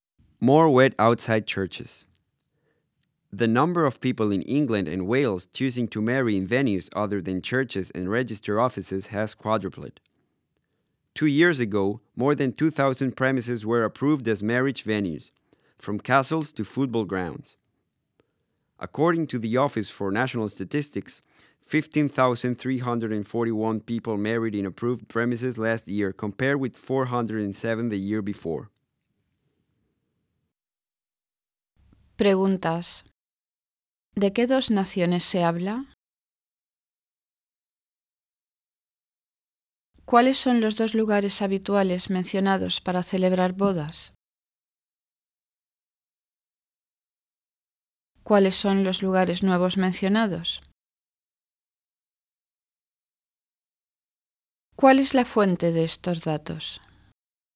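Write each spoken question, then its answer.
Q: ¿De qué dos naciones se habla?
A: Inglaterra y Gales

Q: ¿Cuáles son los dos lugares habituales mencionados para celebrar bodas?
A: Iglesias y registros civiles

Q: ¿Cuáles son los lugares nuevos mencionados?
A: Castillos y estadios de fútbol

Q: ¿Cuál es la fuente de estos datos?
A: La Oficina Nacional de Estadísticas (Office for National Statistics)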